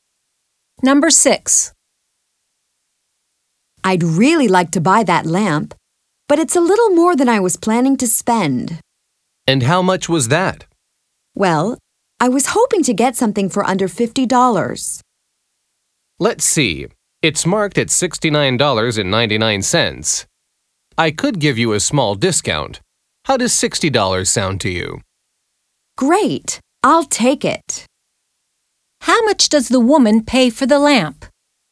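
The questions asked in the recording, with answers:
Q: How much does the woman pay for the lamp?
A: $60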